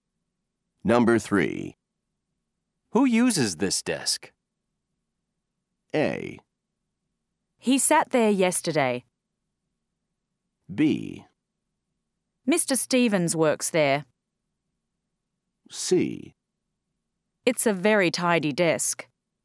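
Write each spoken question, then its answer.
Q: Who uses this desk?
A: B: Mr. Stevens works there.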